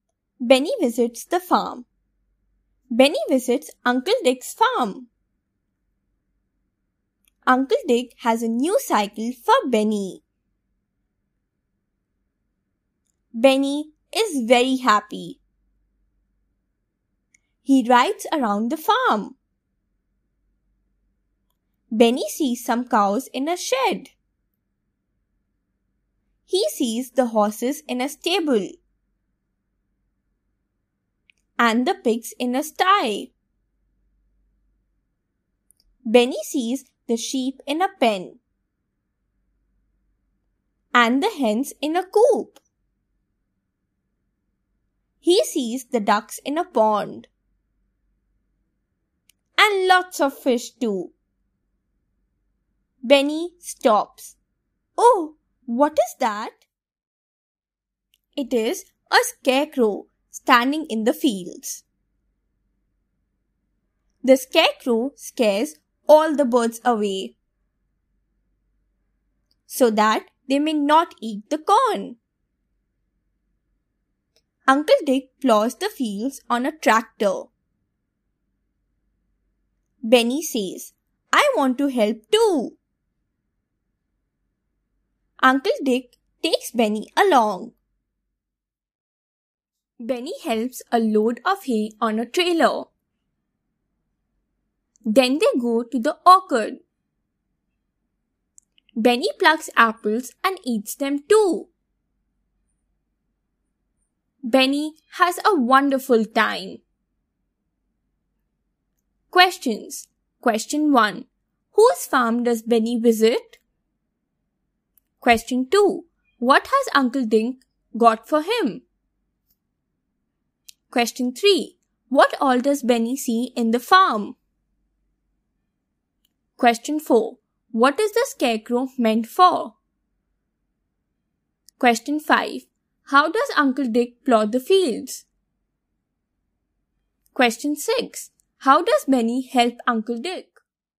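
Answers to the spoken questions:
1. Uncle Dick's farm
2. A new cycle
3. Cows, horses, pigs, sheep, hens, ducks, fish and a scarecrow
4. To scare the birds away so they don't eat the corn
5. On a tractor
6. He helps load hay on a trailer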